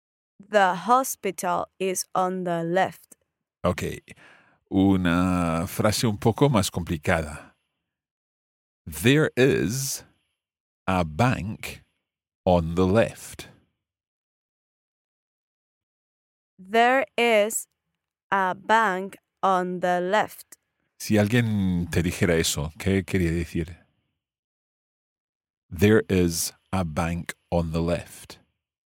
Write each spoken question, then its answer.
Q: Si alguien te dijera eso, ¿qué quería decir?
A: Hay un banco a la izquierda.